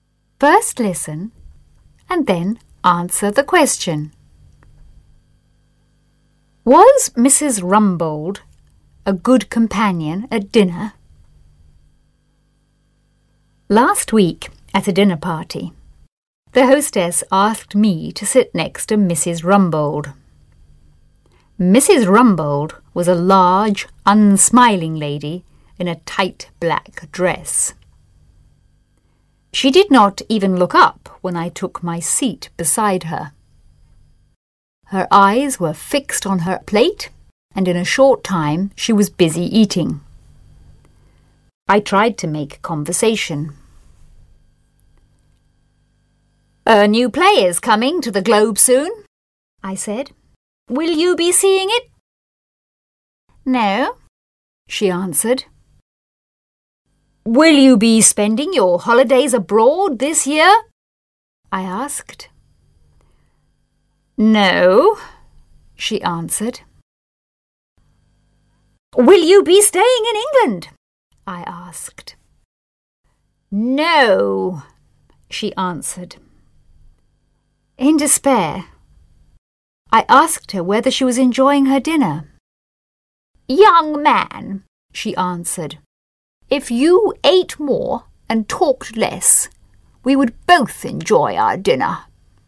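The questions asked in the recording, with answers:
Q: Was Mrs. Rumbold a good companion at dinner?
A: No, she barely talked and only wanted to eat.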